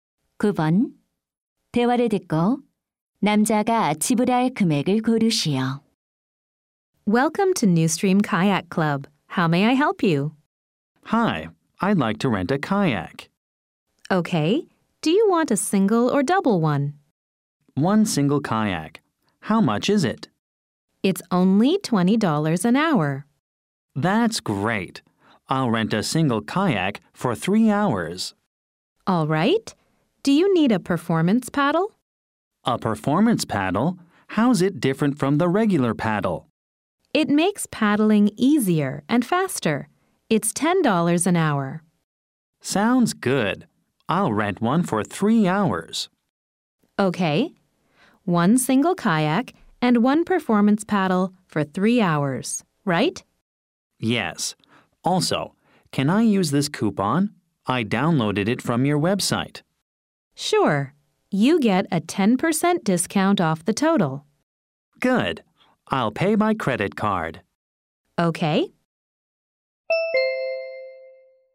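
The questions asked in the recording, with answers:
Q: 대화를 듣고 남자가 지불할 금액을 고르시오.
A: $81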